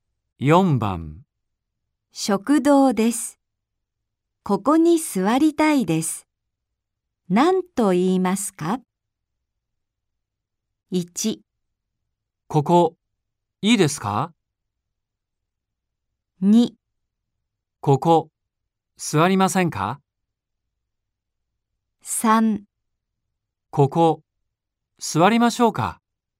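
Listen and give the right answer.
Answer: 1: ここ、いいですか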